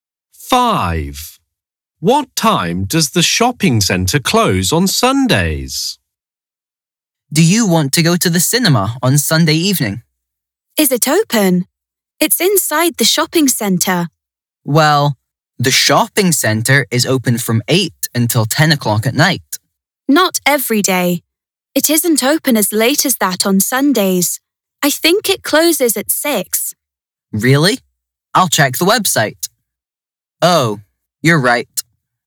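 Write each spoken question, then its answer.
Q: What time does the shopping centre close on Sundays?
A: 6 o'clock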